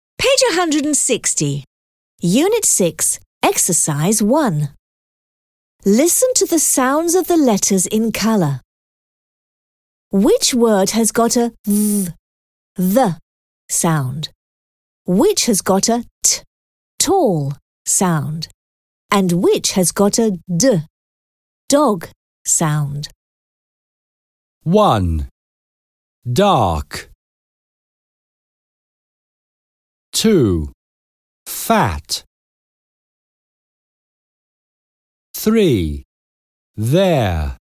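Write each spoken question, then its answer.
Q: Which word has got a th sound?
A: There

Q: Which has got a t tall sound?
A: Fat

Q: And which has got a d dog sound?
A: Dark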